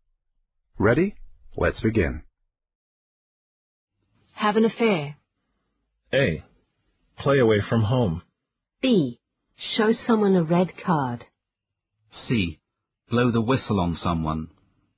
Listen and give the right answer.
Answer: The answer is A. Play away from home.